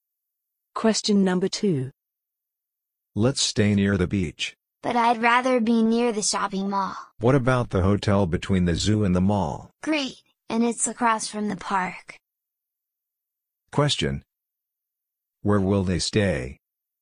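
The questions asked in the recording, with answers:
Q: Where will they stay?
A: At the hotel between the zoo and the mall, across from the park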